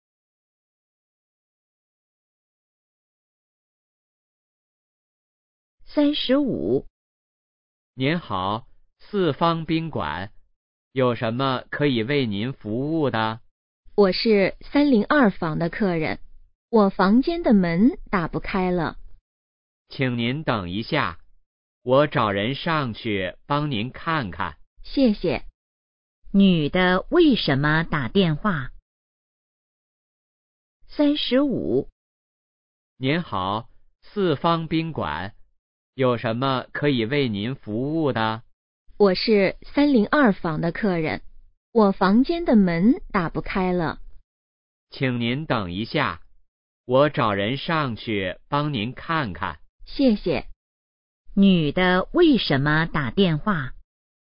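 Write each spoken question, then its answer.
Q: 女的为什么打电话?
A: 房间的门打不开了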